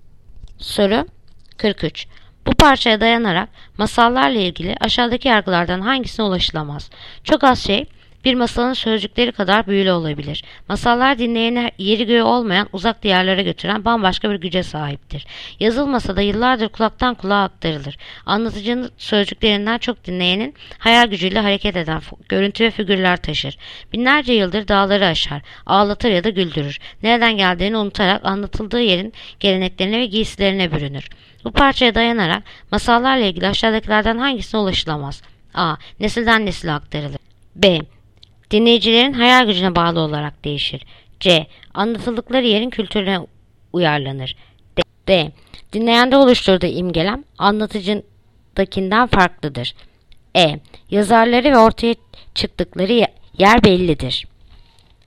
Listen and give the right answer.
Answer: Yanıt: Edirne. Yazarları ve ortaya çıktıkları yer bellidir.